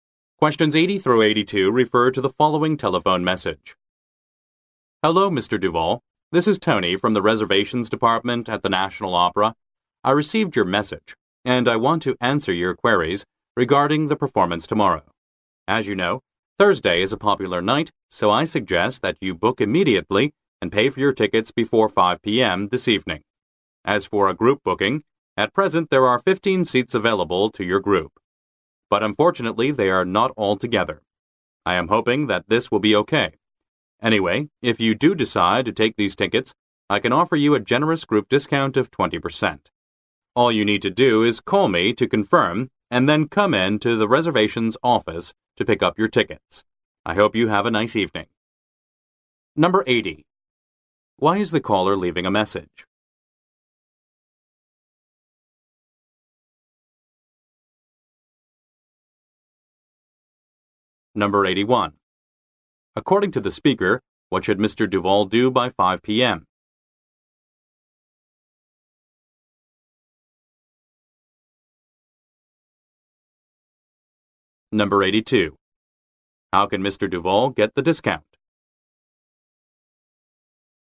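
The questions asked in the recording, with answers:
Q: Why is the caller leaving a message?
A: To answer Mr. Duval's questions about booking tickets for the performance

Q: How can Mr. Duval get the discount?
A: By taking the 15 seats as a group booking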